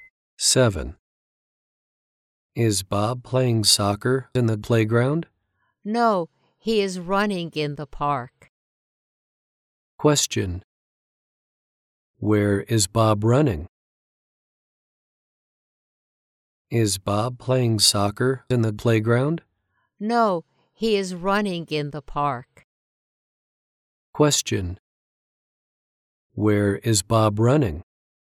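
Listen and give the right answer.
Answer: In the park.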